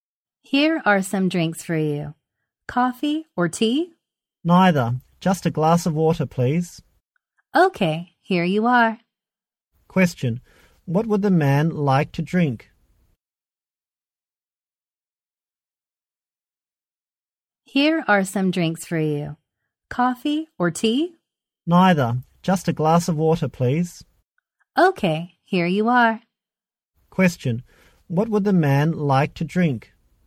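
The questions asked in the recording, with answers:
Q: What would the man like to drink?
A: A glass of water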